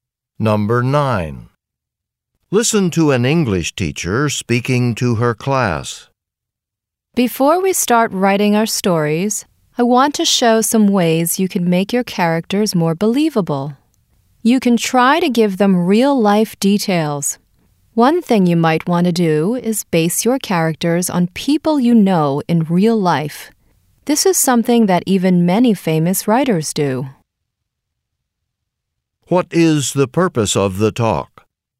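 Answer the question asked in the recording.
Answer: To show how to make characters more believable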